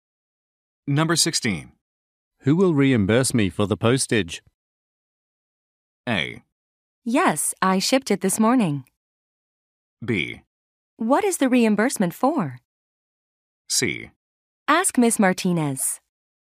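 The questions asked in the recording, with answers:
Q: Who will reimburse me for the postage?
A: C: Ask Miss Martinez.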